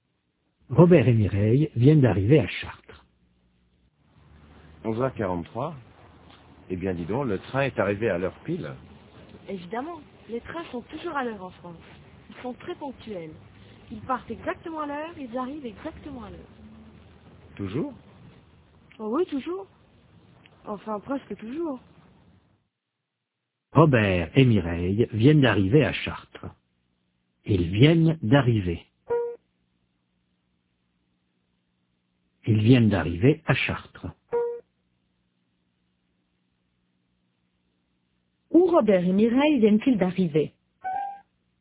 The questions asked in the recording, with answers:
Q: Où Robert et Mireille viennent-ils d'arriver ?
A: À Chartres.